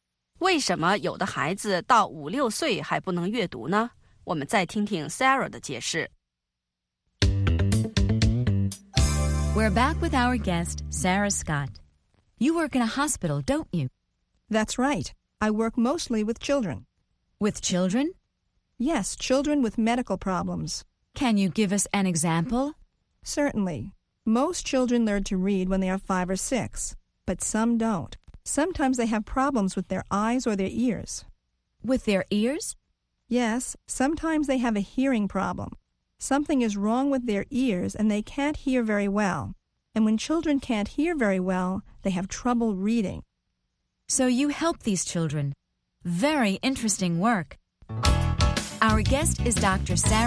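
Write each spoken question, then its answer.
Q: Why do some children up to 5 or 6 years old still can't read?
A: They have problems with their eyes or ears, such as a hearing problem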